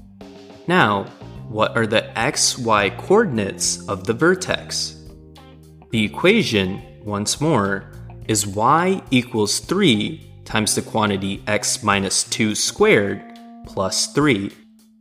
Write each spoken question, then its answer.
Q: Now, what are the x-y coordinates of the vertex?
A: The vertex is at 2, 3